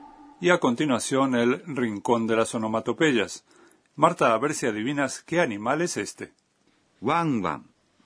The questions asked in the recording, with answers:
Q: Marta, a ver si adivinas qué animal es este.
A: Ah, sí, es un perro.